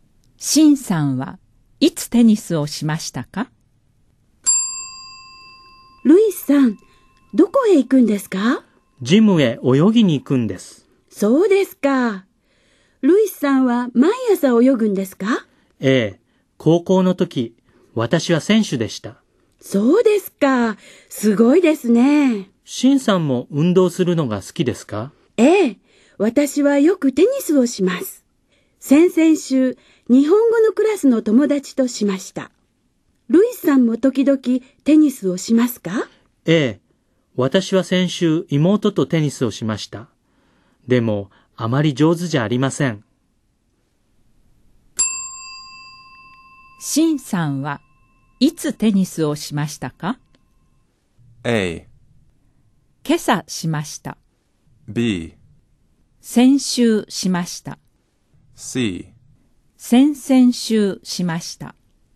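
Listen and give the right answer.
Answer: C: 先々週しました。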